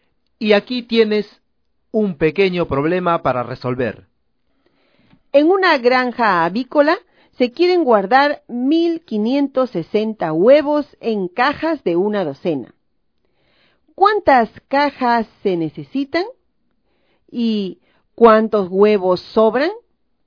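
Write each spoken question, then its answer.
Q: ¿Cuántas cajas se necesitan?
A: 130 cajas

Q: ¿Y cuántos huevos sobran?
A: Ninguno (0)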